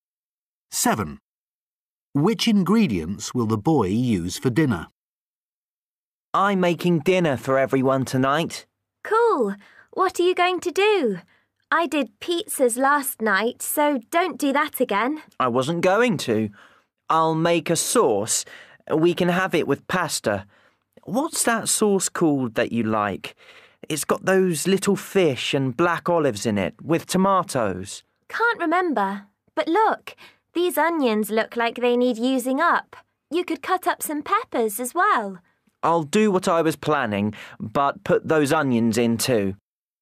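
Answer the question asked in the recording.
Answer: Little fish, black olives, tomatoes and onions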